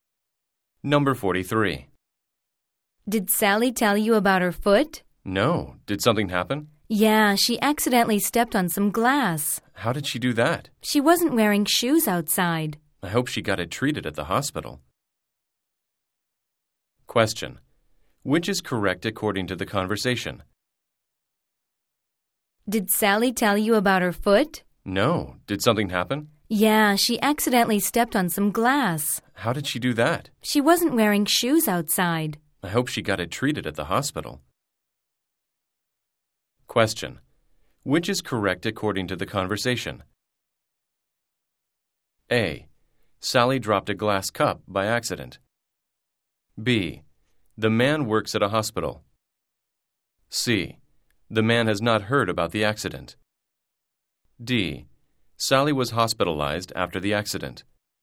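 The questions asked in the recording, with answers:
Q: Which is correct according to the conversation?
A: C: The man has not heard about the accident.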